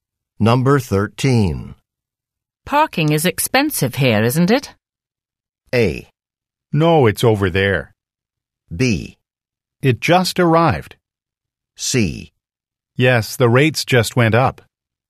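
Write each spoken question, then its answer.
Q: Parking is expensive here, isn't it?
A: C: Yes, the rates just went up.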